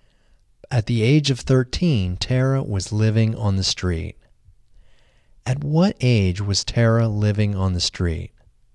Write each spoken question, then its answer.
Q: At what age was Tara living on the street?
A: Tara was living on the street at the age of 13.